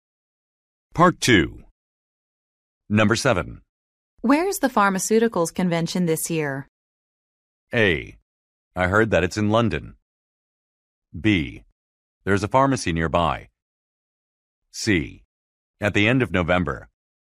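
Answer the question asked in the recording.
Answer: A: I heard that it's in London.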